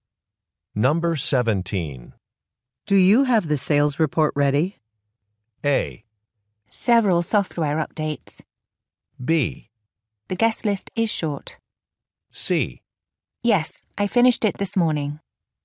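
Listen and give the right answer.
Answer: C: Yes, I finished it this morning.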